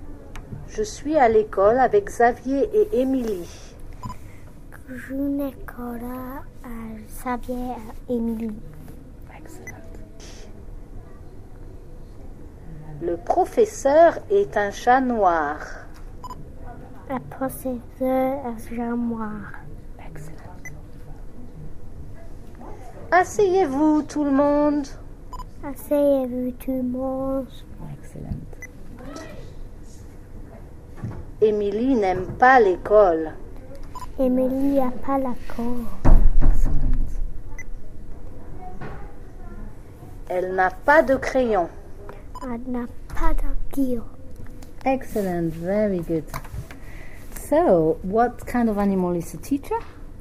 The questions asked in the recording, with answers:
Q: So, what kind of animal is the teacher?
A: Cat.